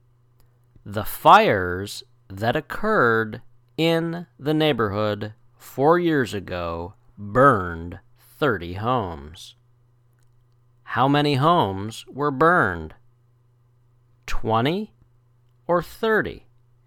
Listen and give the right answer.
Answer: 30 homes. 30 homes were burned.